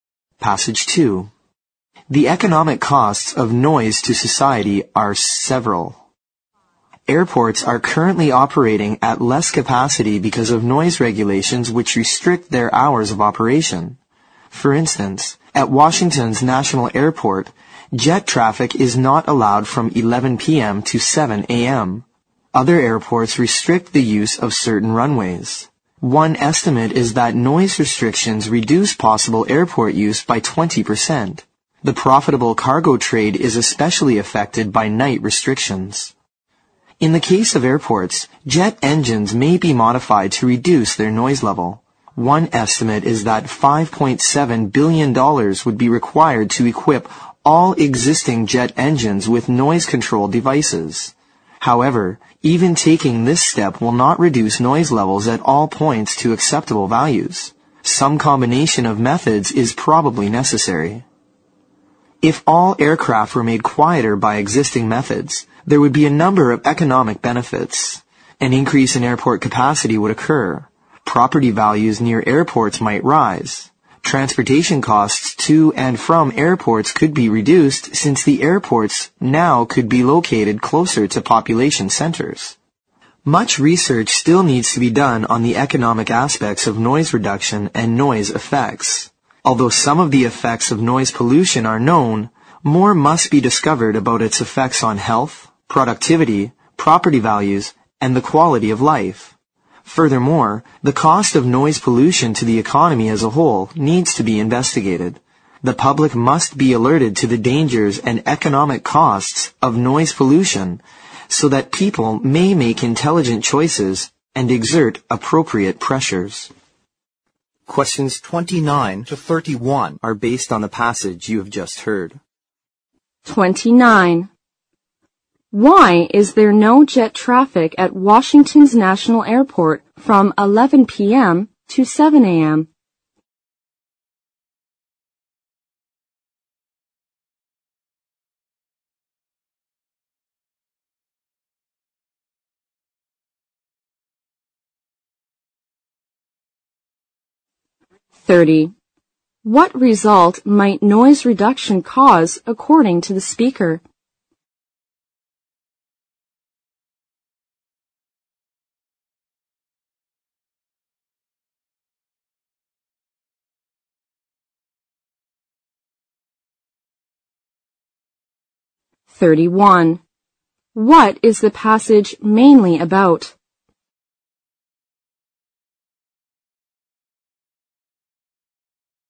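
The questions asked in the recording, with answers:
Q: Why is there no jet traffic at Washington's National Airport from 11 p.m. to 7 a.m.?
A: Because of noise regulations

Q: What is the passage mainly about?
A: The economic costs of noise pollution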